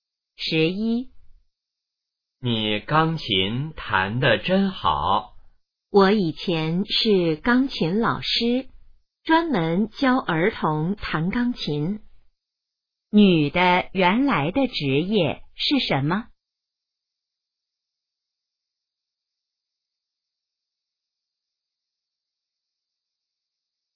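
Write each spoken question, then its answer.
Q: 女的原来的职业是什么?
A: 钢琴老师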